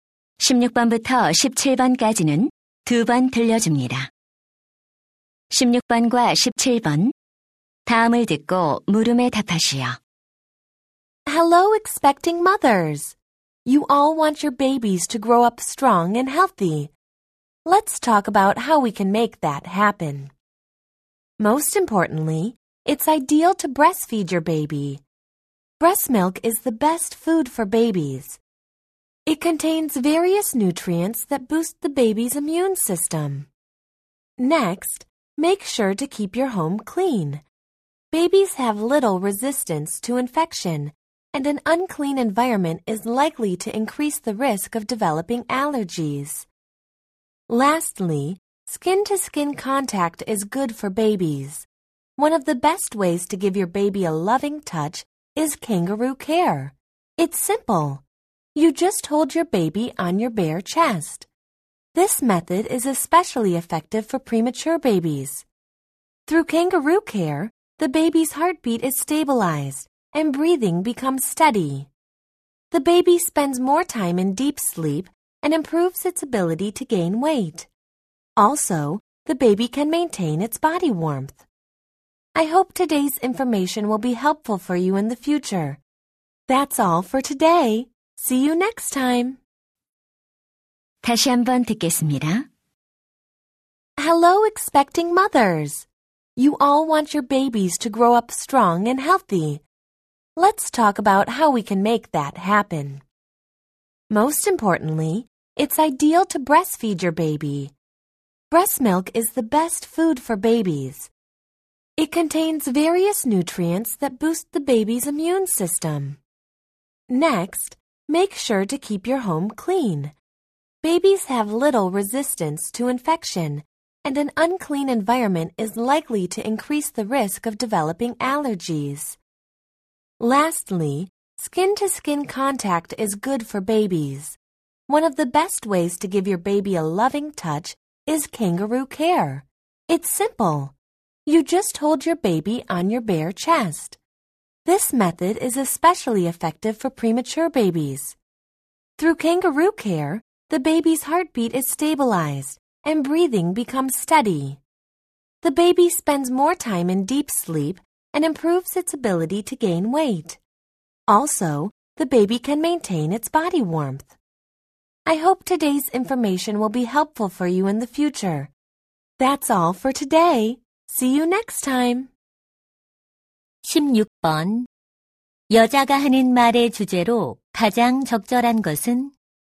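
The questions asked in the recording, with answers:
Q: 여자가 하는 말의 주제로 가장 적절한 것은?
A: 아기를 건강하게 키우는 방법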